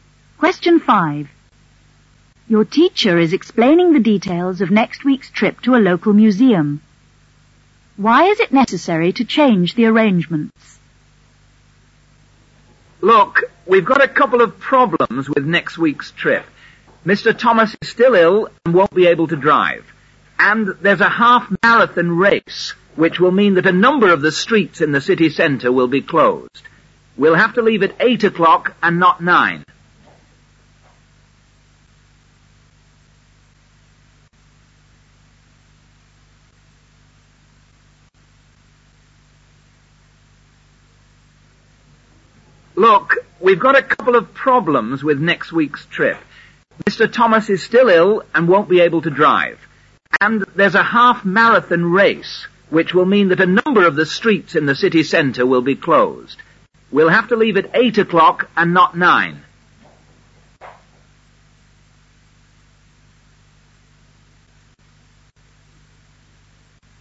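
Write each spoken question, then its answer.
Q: Why is it necessary to change the arrangements?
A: Mr Thomas is ill and can't drive, and streets in the city centre will be closed for a half-marathon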